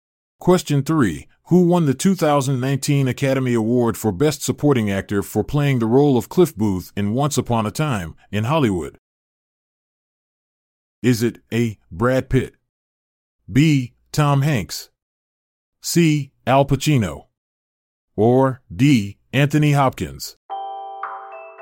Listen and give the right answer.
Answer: The answer is A. Brad Pitt.